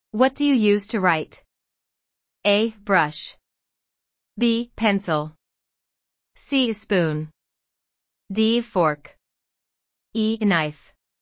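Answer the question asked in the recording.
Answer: B: Pencil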